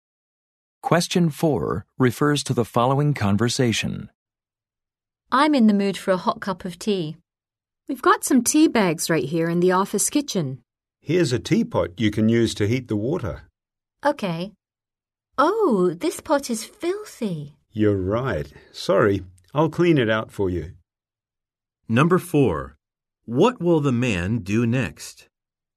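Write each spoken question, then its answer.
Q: What will the man do next?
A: Clean the teapot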